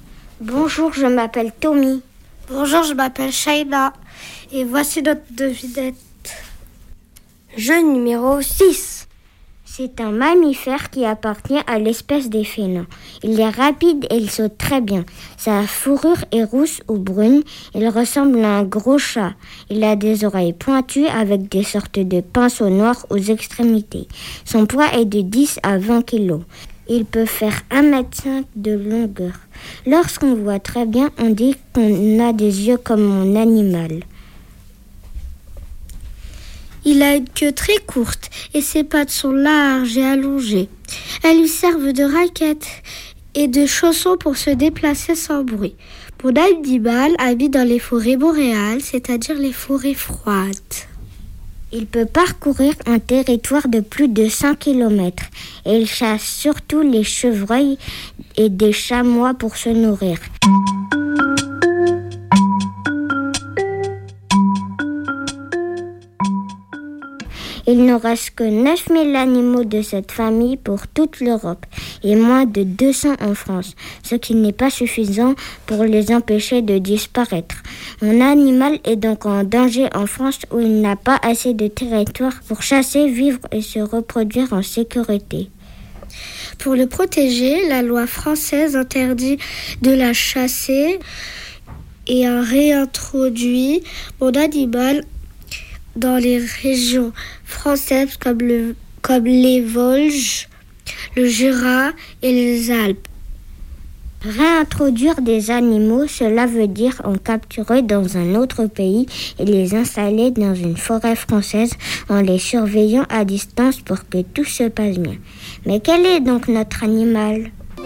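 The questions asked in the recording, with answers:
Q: Mais quel est donc notre animal ?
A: le lynx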